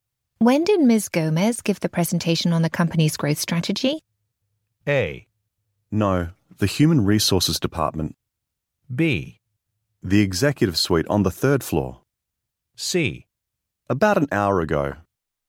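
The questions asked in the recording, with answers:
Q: When did Ms. Gomez give the presentation on the company's growth strategy?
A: C: About an hour ago.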